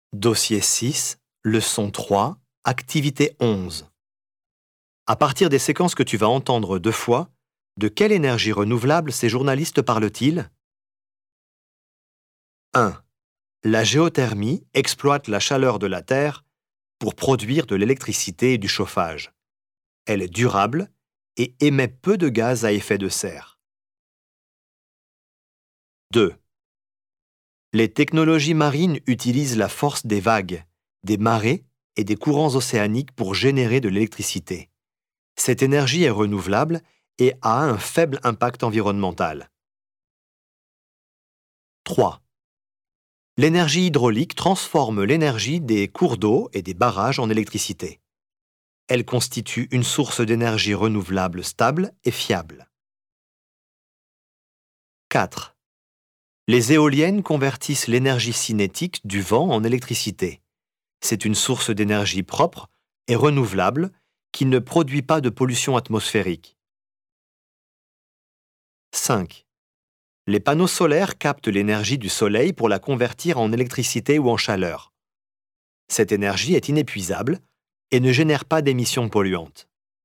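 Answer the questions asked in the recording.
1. la géothermie
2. les énergies marines (vagues, marées, courants)
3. l'énergie hydraulique
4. l'énergie éolienne
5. l'énergie solaire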